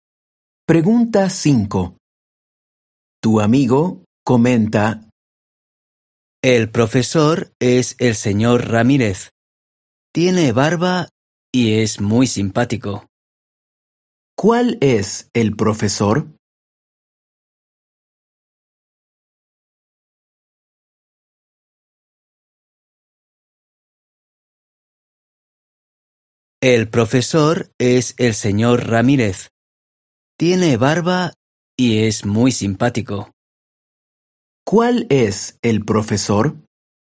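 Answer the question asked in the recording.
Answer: El señor Ramírez, el que tiene barba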